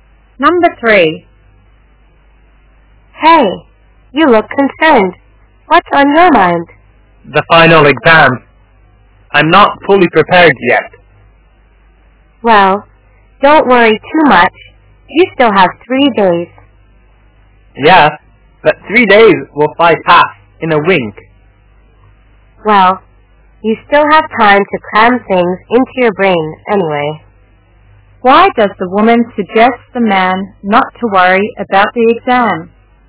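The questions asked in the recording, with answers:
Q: Why does the woman suggest the man not to worry about the exam?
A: He still has 3 days to prepare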